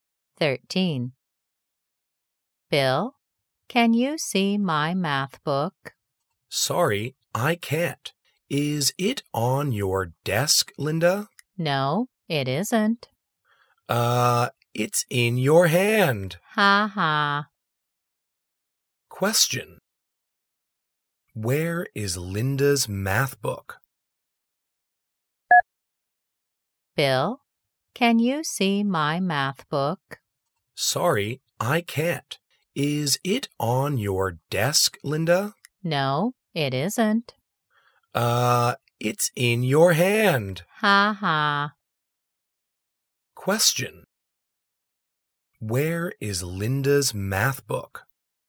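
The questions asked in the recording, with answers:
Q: Where is Linda's math book?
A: in her hand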